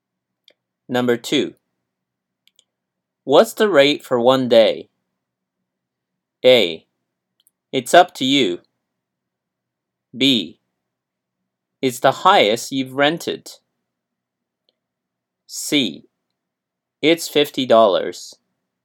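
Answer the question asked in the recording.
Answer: C: It's $50.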